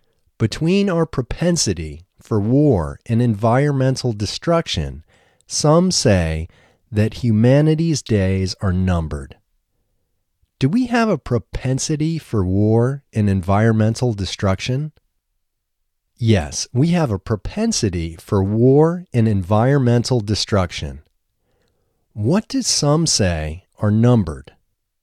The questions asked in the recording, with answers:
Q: What do some say are numbered?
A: Some say that humanity's days are numbered.